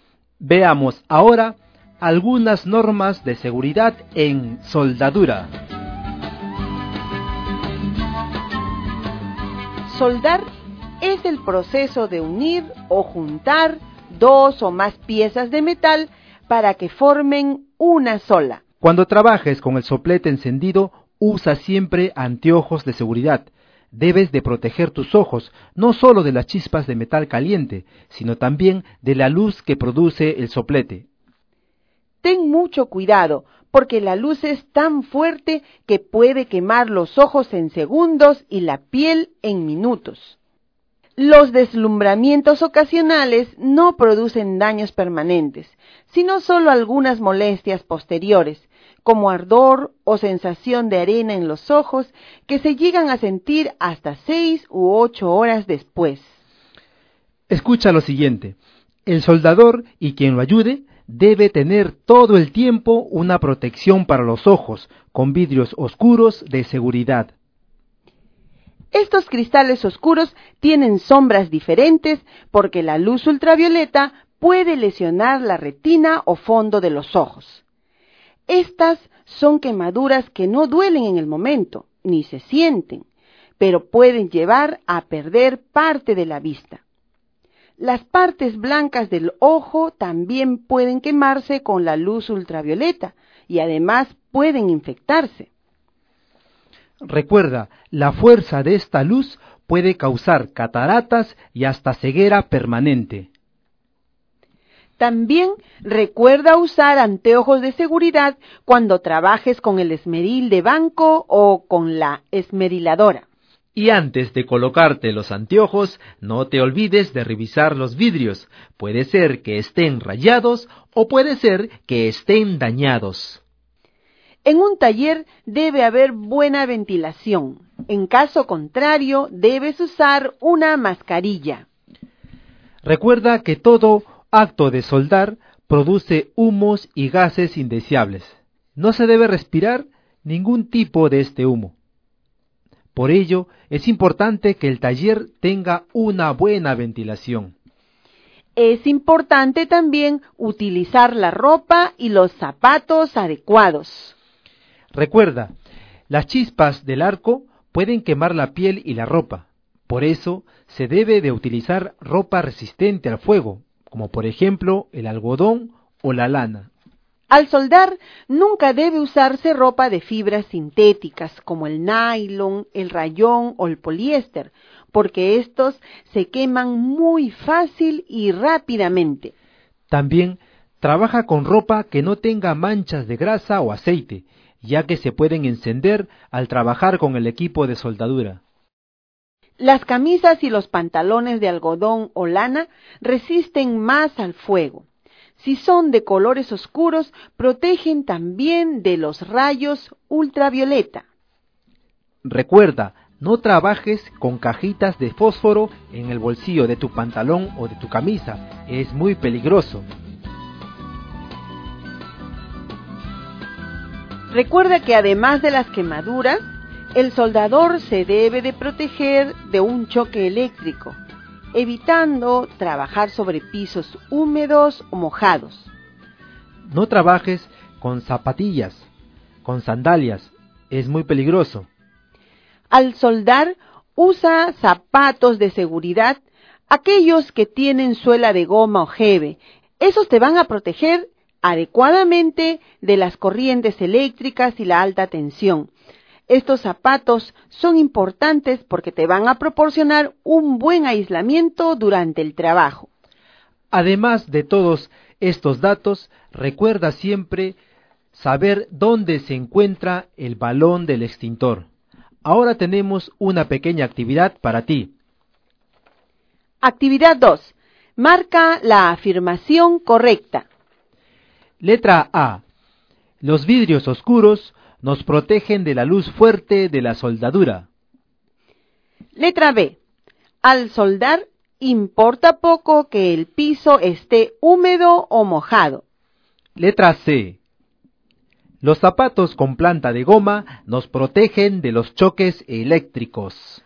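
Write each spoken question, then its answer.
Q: Marca la afirmación correcta.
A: A: Los vidrios oscuros nos protegen de la luz fuerte de la soldadura. y C: Los zapatos con planta de goma nos protegen de los choques eléctricos.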